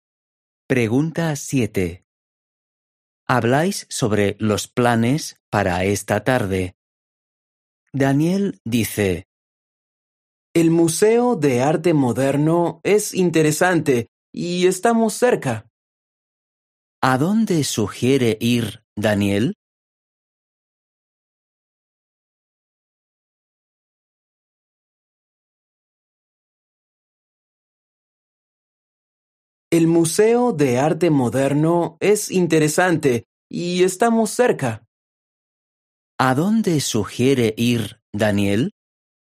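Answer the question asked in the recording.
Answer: Al Museo de Arte Moderno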